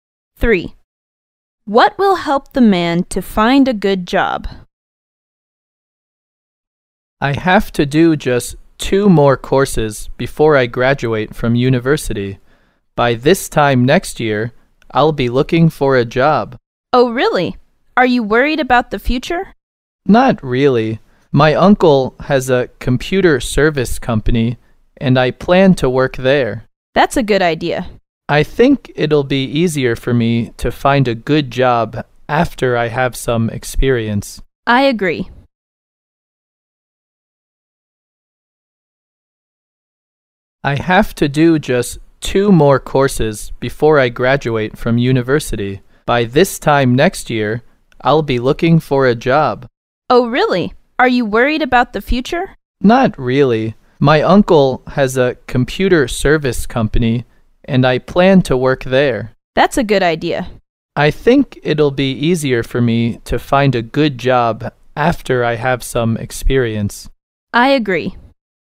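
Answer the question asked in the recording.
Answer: Having some work experience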